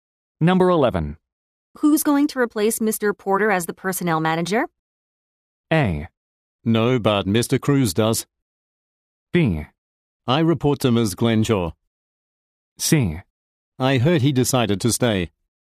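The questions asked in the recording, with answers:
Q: Who's going to replace Mr. Porter as the personnel manager?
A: C: I heard he decided to stay.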